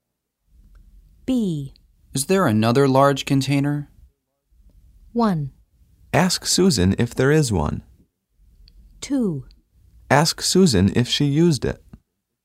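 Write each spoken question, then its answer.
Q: Is there another large container?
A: 1: Ask Susan if there is one.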